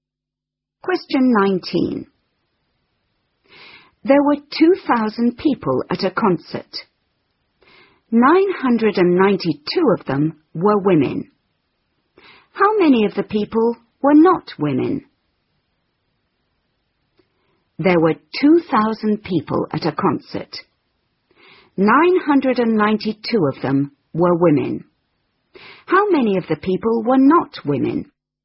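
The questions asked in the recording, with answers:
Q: How many of the people were not women?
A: 1008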